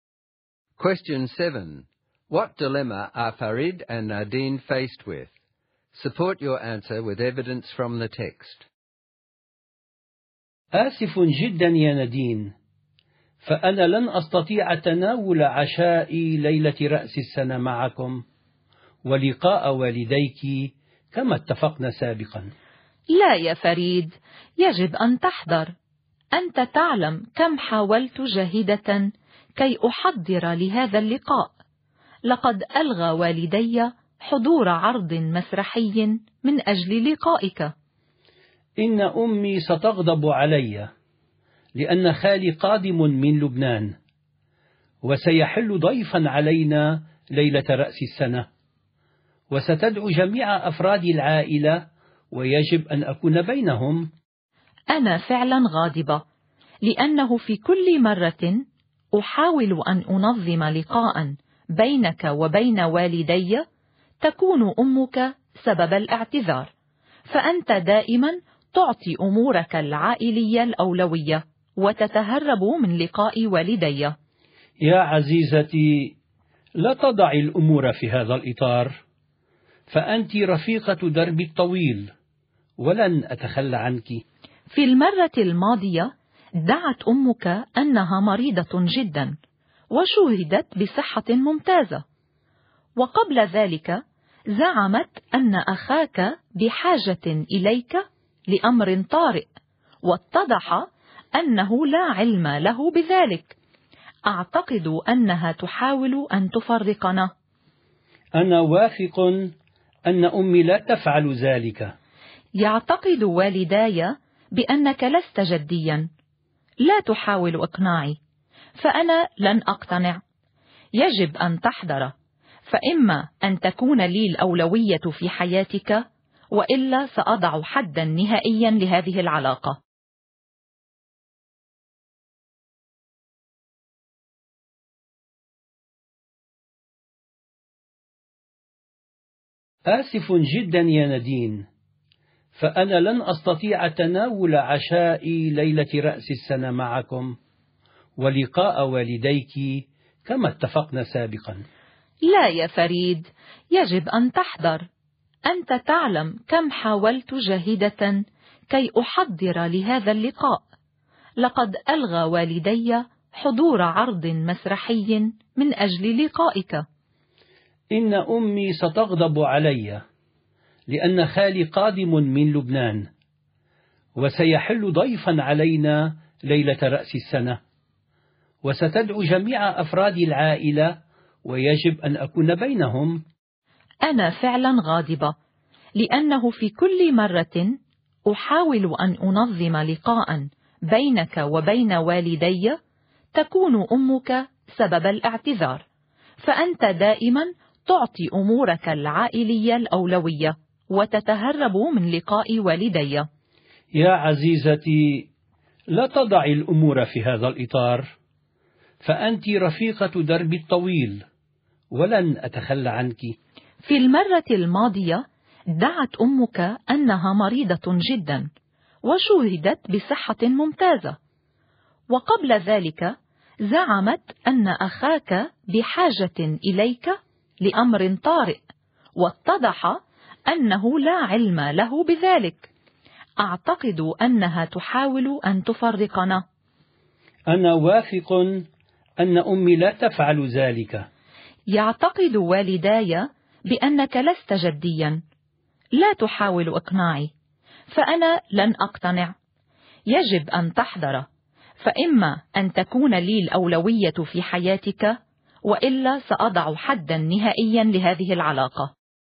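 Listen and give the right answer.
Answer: Farid must choose between New Year's dinner with Nadine's parents and his family gathering for his uncle from Lebanon; Nadine threatens to end the relationship unless she is his priority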